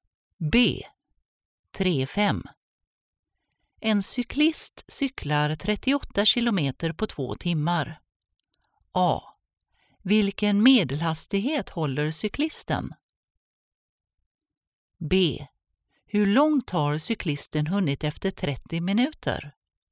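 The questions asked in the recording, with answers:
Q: Vilken medelhastighet håller cyklisten?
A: 19 km/h

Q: Hur långt har cyklisten hunnit efter 30 minuter?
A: 9,5 km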